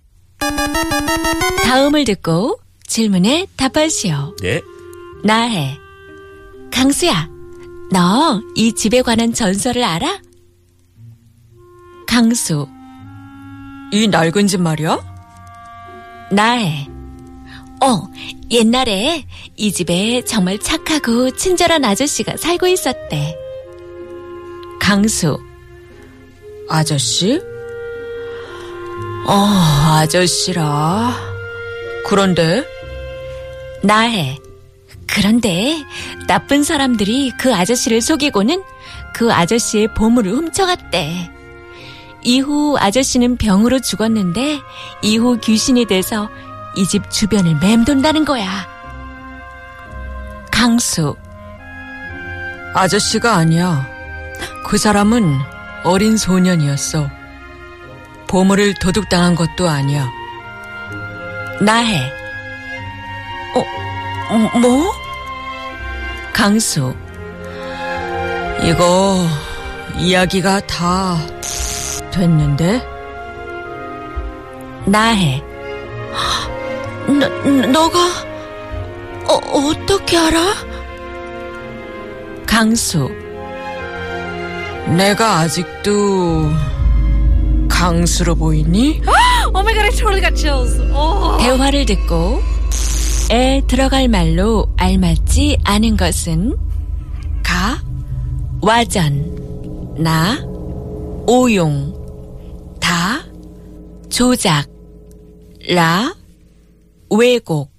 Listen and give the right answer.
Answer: 나 오용. So you can say, 이거 이야기가 다 오용됐는데, the story has been totally misused.